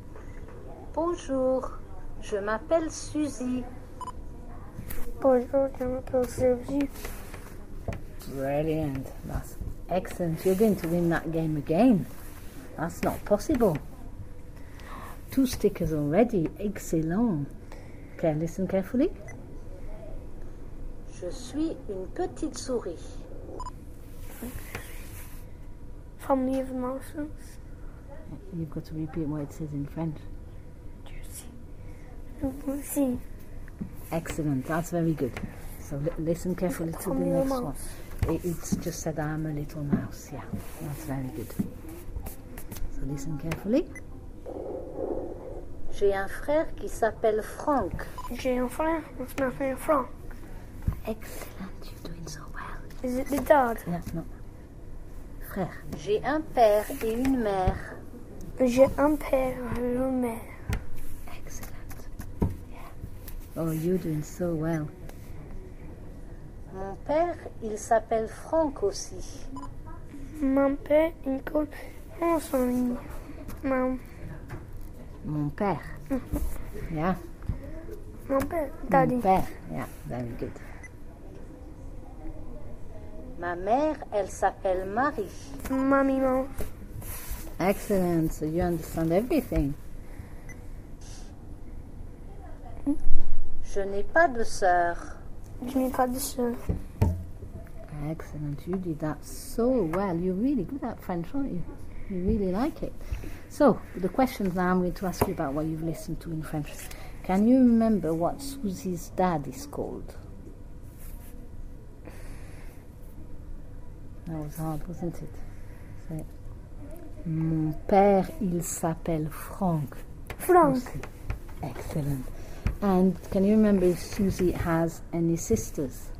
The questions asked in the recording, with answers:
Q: Can you remember what Susie's dad is called?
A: Mon père, il s'appelle Franck.

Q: And can you remember if Susie has any sisters?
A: Je n'ai pas de sœur.